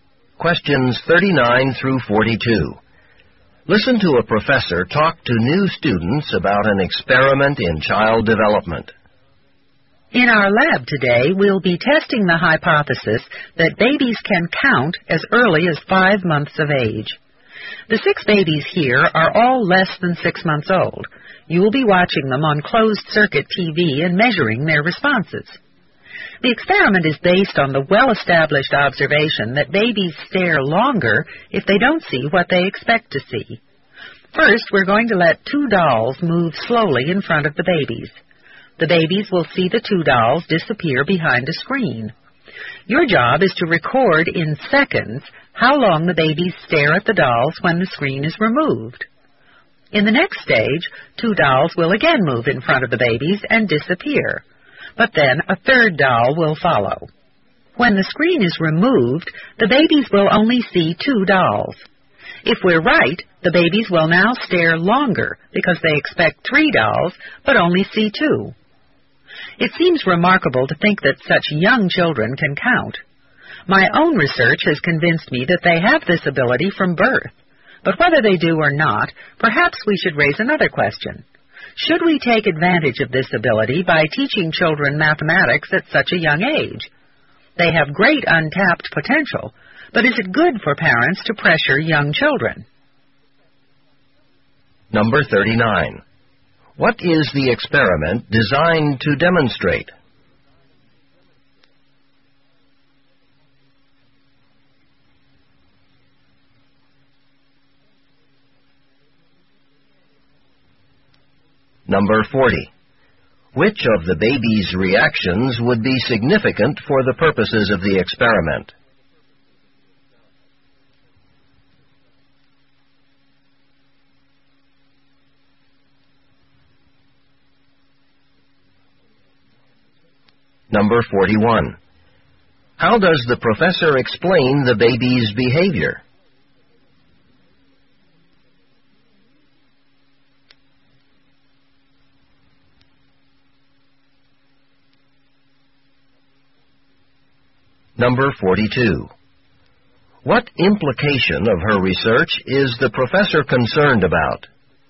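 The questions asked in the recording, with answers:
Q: What is the experiment designed to demonstrate?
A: That babies can count as early as 5 months of age

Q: Which of the baby's reactions would be significant for the purposes of the experiment?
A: Staring longer when they see two dolls instead of the expected three

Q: How does the professor explain the baby's behavior?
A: Babies stare longer when they don't see what they expect to see

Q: What implication of her research is the professor concerned about?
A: That parents may pressure very young children by teaching them mathematics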